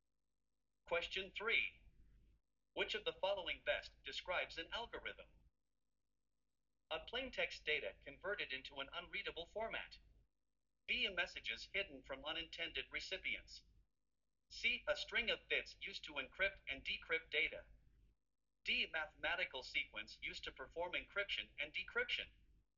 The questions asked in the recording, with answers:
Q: Which of the following best describes an algorithm?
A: The correct answer is D.